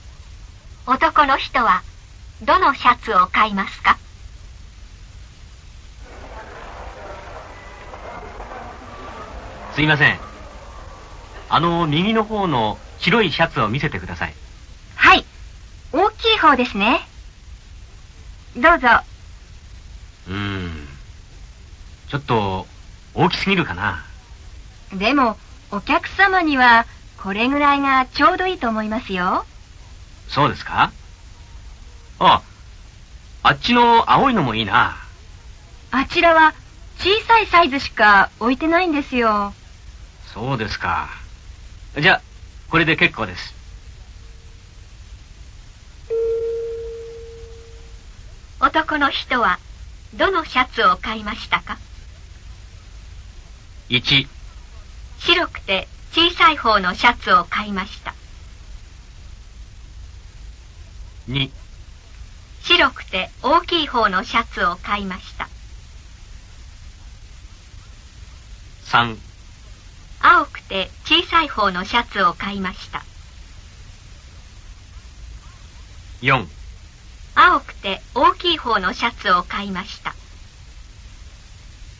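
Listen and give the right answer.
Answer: 2: 白くて大きい方のシャツを買いました。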